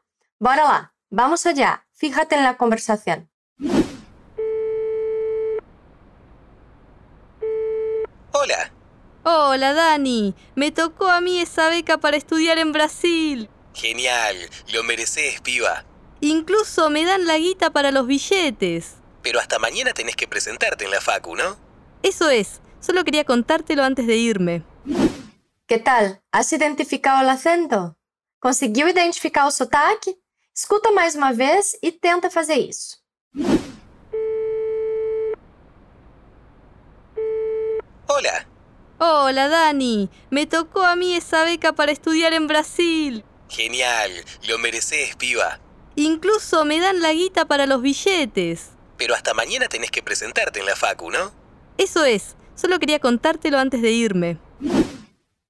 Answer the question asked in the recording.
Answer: Daniel e a Belen, são argentinas.